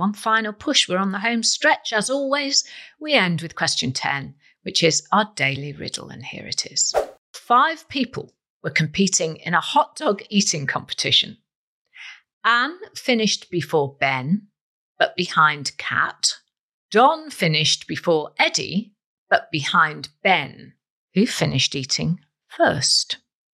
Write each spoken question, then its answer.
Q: Who finished eating first?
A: And the answer is Kat.